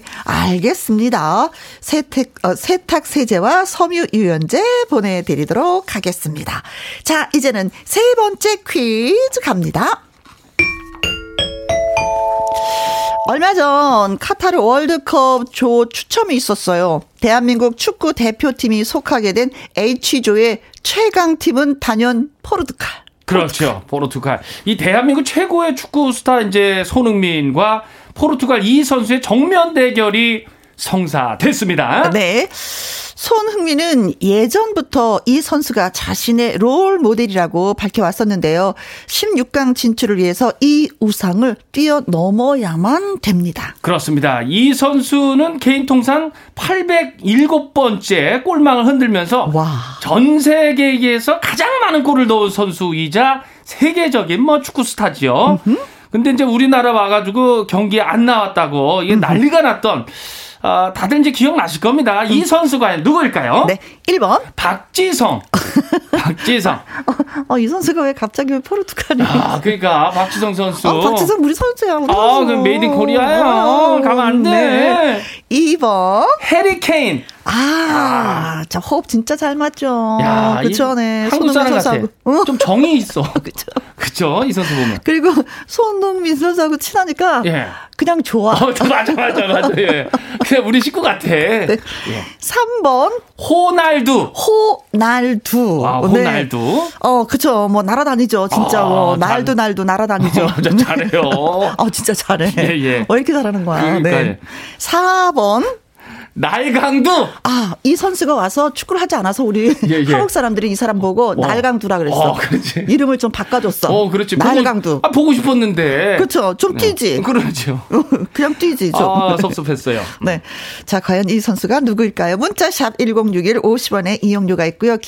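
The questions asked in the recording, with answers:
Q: 자, 과연 이 선수가 누구일까요?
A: 3: 호날두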